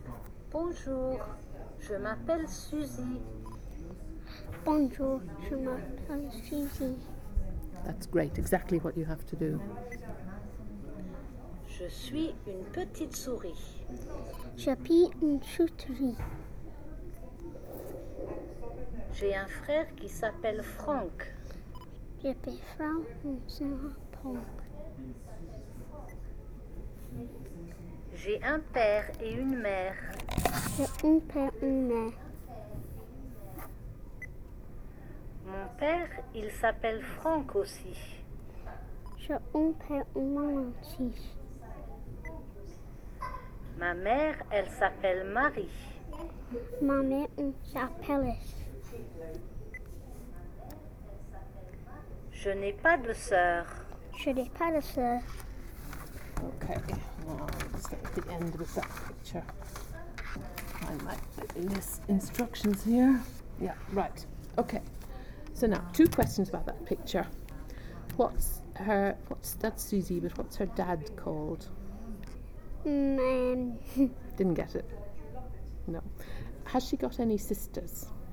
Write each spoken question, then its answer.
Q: Has she got any sisters?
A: No.